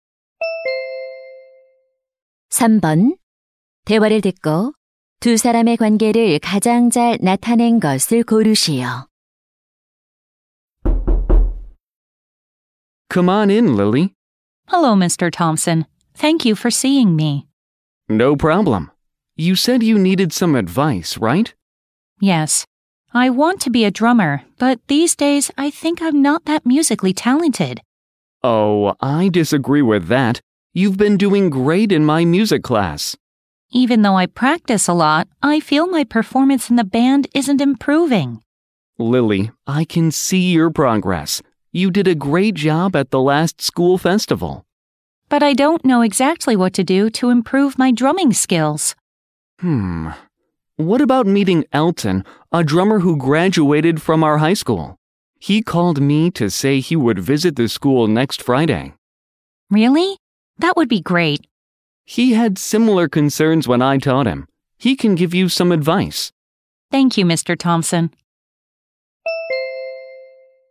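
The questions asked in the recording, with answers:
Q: 대화를 듣고 두 사람의 관계를 가장 잘 나타낸 것을 고르시오.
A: 학생 - 음악 교사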